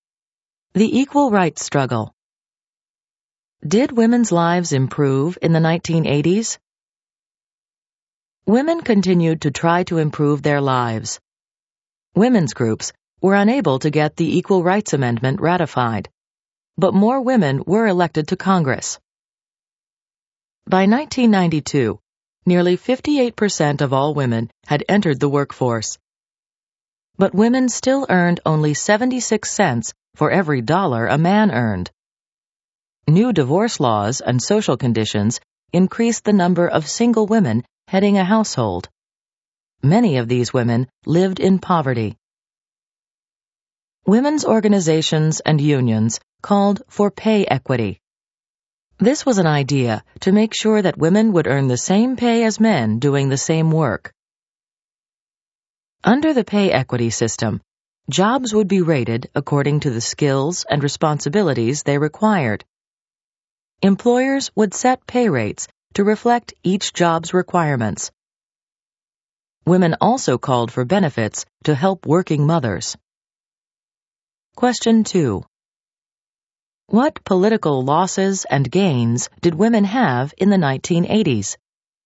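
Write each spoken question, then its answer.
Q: What political losses and gains did women have in the 1980s?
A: They failed to get the Equal Rights Amendment ratified, but more women were elected to Congress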